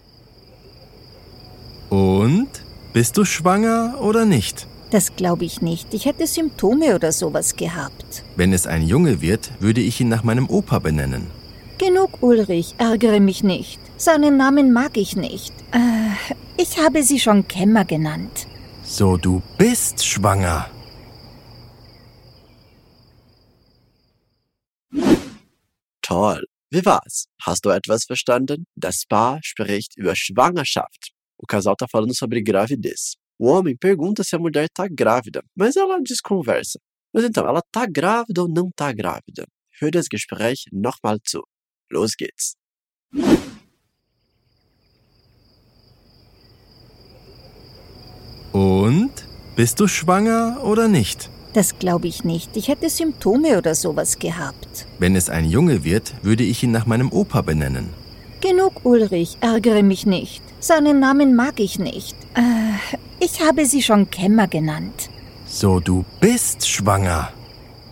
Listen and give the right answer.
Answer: Sie war bereits schwanger, aber sie wollte es Ulrich noch nicht sagen.